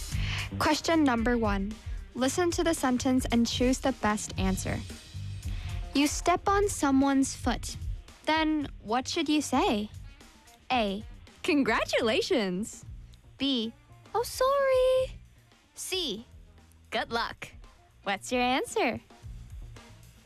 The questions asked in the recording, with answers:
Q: You step on someone's foot. Then what should you say?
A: 당연히 sorry라고 해야죠.